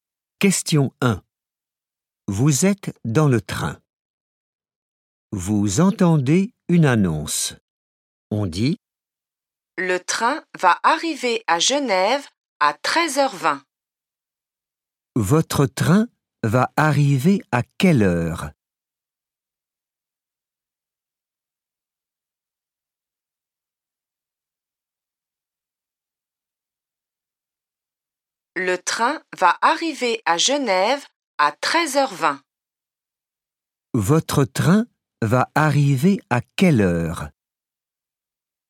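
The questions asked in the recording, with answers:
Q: Votre train va arriver à quelle heure ?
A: 13h20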